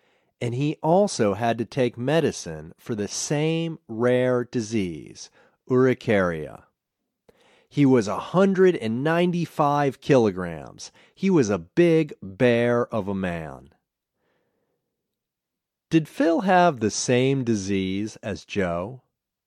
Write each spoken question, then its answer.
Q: Did Phil have the same disease as Joe?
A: Yes, Phil had the same rare disease.